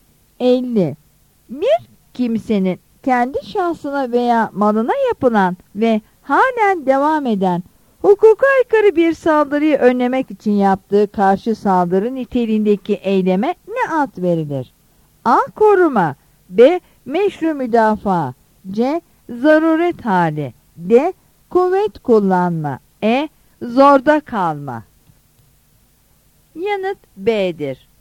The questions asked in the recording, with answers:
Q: Bir kimsenin kendi şahsına veya malına yapılan ve halen devam eden hukuka aykırı bir saldırıyı önlemek için yaptığı karşı saldırı niteliğindeki eyleme ne ad verilir?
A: Yanıt B'dir.